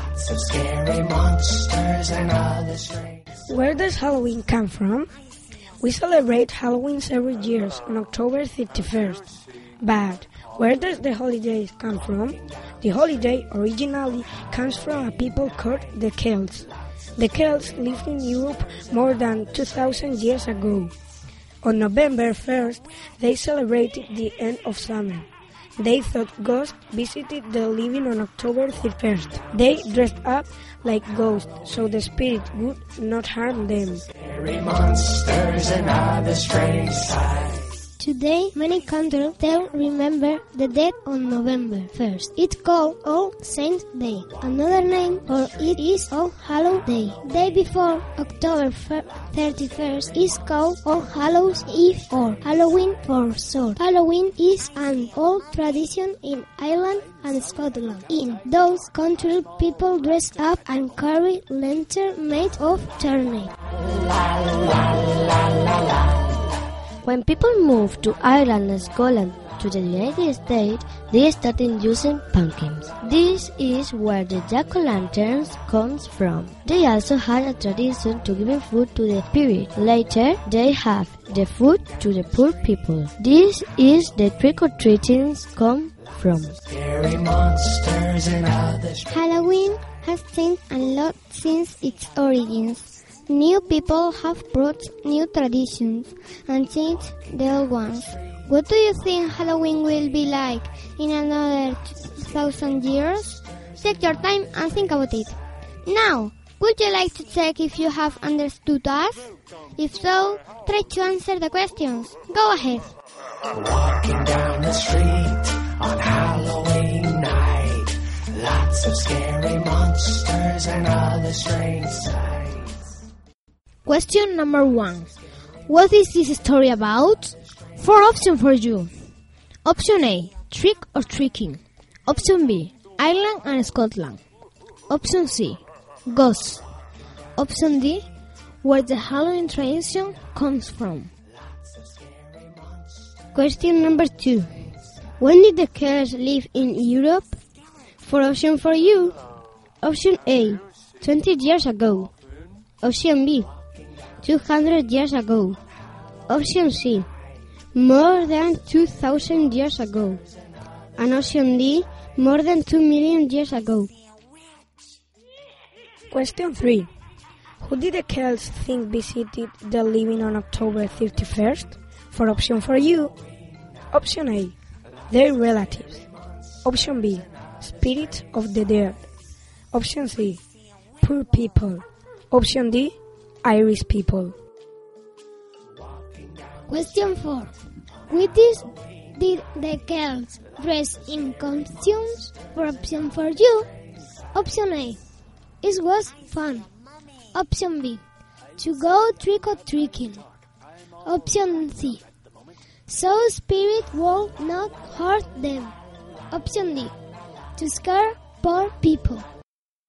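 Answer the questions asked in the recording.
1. D: where the Halloween tradition comes from
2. C: more than 2,000 years ago
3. B: spirits of the dead
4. C: so spirit will not hurt them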